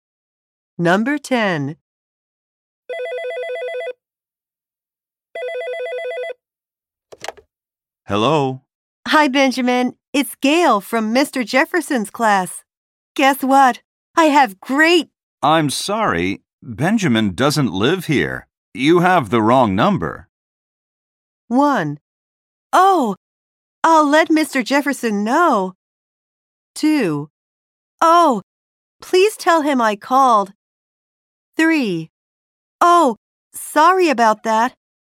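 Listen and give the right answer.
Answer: 3: Oh, sorry about that.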